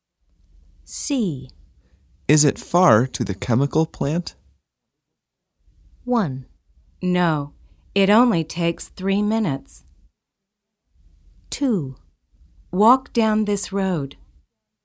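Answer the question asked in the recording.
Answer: 1: No, it only takes 3 minutes.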